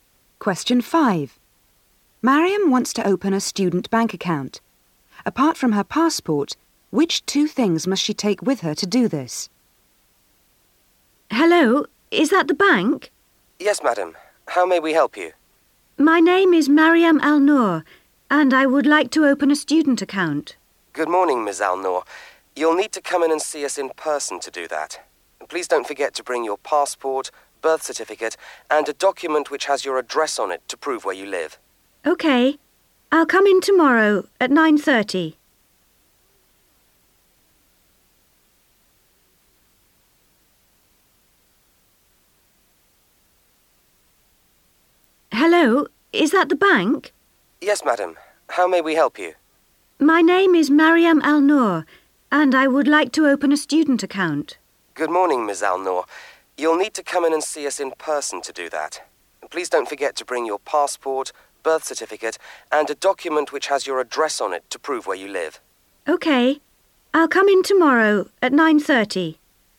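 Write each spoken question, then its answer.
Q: Apart from her passport, which two things must she take with her to do this?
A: Her birth certificate and a document showing her address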